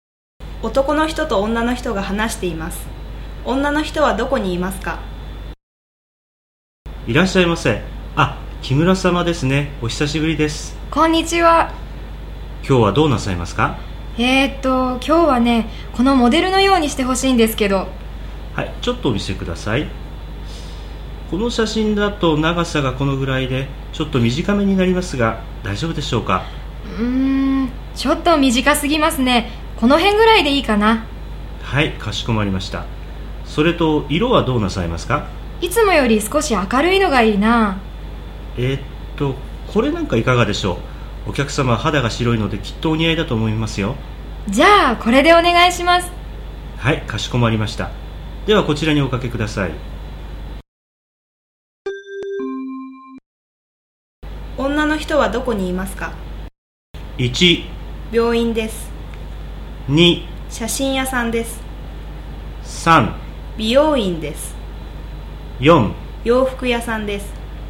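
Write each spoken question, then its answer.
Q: 女の人はどこにいますか?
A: 3: 美容院です。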